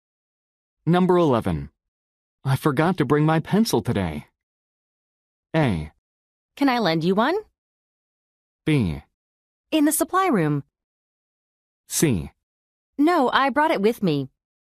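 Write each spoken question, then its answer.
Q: I forgot to bring my pencil today.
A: A: Can I lend you one?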